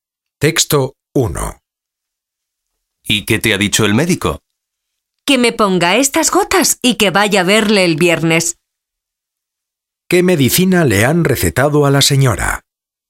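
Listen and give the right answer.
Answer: Unas gotas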